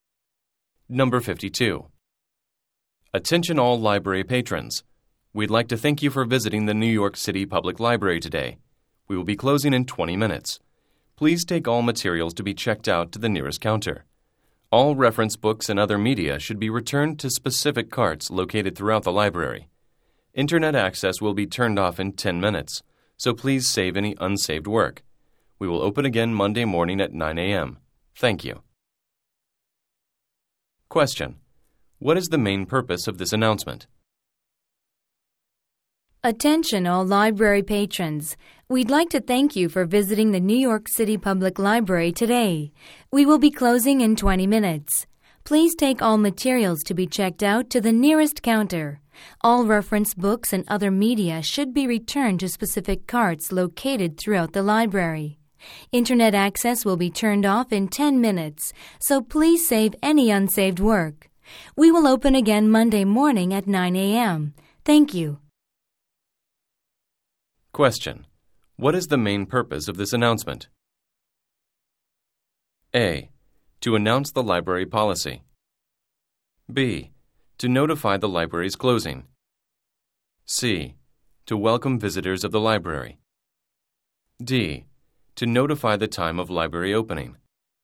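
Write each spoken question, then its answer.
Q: What is the main purpose of this announcement?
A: B: To notify the library's closing.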